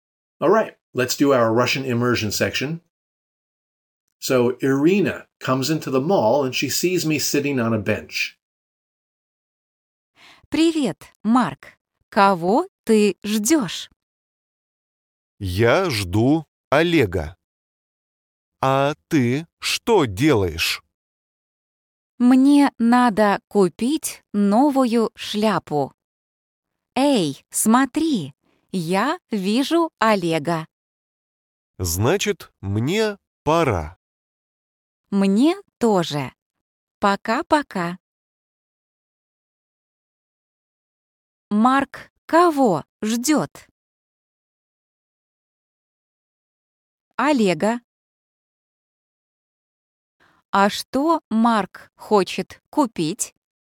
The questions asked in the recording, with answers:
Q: Марк кого ждет?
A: Олега.

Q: А что Марк хочет купить?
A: Не знаю, он не сказал.